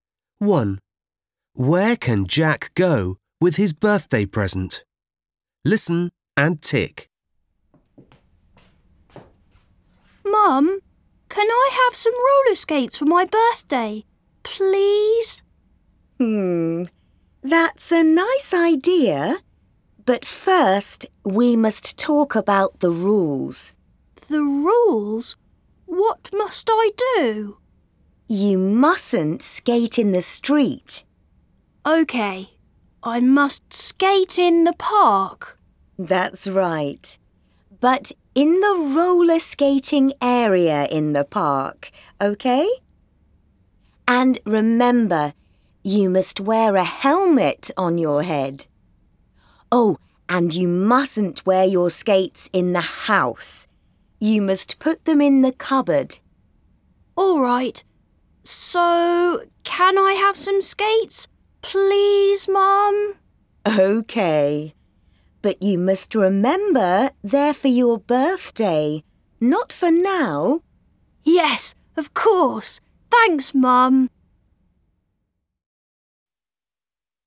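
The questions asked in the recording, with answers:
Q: Where can Jack go with his birthday present?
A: To the roller skating area in the park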